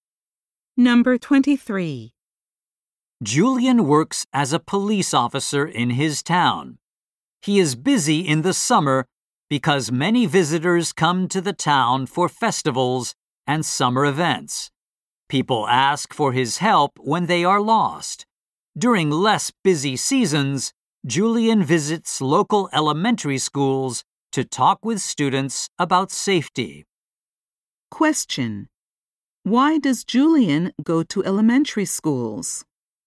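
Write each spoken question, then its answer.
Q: Why does Julian go to elementary schools?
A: To talk with students about safety.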